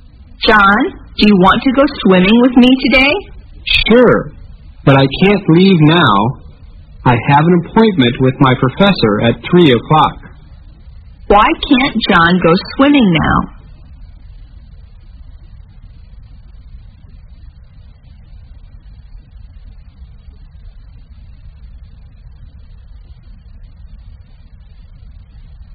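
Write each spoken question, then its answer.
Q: Why can't John go swimming now?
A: He has an appointment with his professor at 3 o'clock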